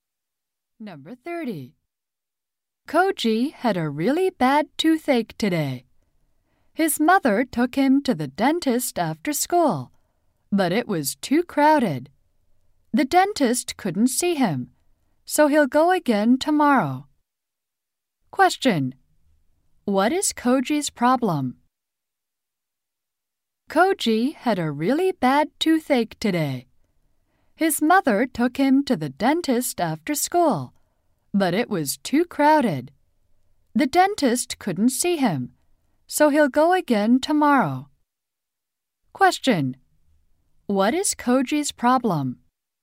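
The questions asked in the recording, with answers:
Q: What is Koji's problem?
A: He has a bad toothache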